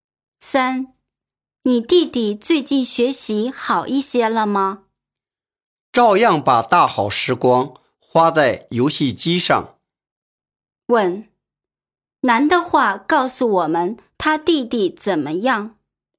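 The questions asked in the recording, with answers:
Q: 男的话告诉我们他弟弟怎么样?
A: 没有进步,还是把时间花在玩游戏机上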